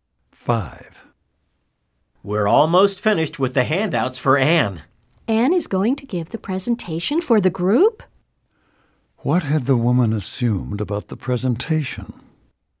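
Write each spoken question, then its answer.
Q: What had the woman assumed about the presentation?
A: That someone other than Anne would give it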